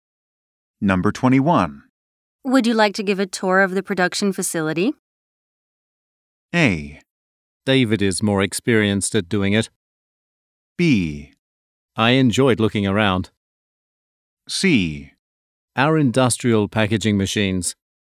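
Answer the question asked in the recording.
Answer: A: David is more experienced at doing it.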